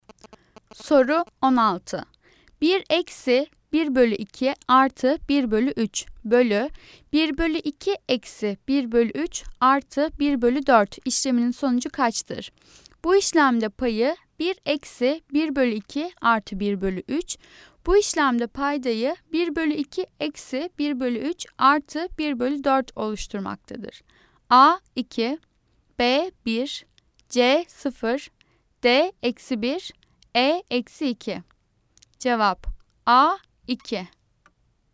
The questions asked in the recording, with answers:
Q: 1 eksi 1 bölü 2 artı 1 bölü 3 bölü 1 bölü 2 eksi 1 bölü 3 artı 1 bölü 4 işleminin sonucu kaçtır?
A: Cevap A 2.